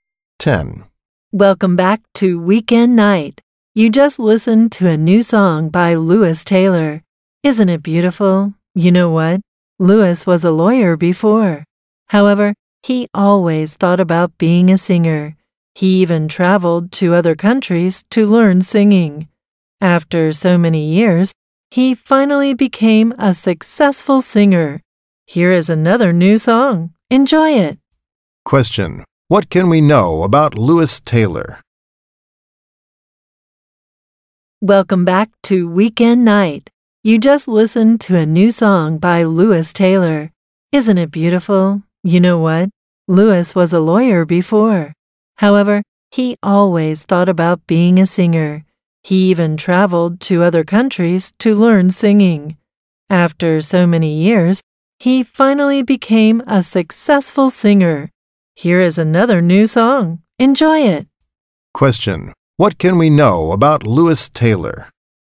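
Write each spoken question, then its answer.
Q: What can we know about Lewis Taylor?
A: He was a lawyer before and became a successful singer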